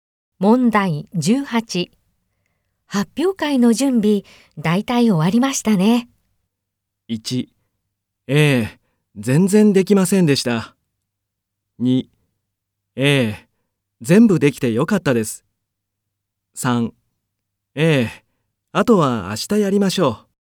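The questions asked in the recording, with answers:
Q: 発表会の準備、大体終わりましたね。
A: 2: ええ、あとは明日やりましょう。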